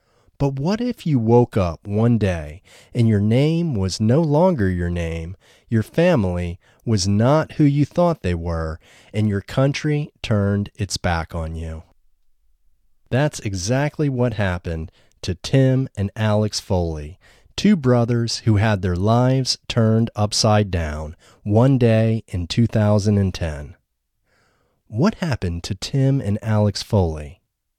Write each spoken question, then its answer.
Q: What happened to Tim and Alex Foley?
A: Tim and Alex Foley had their lives turned upside down one day in 2010.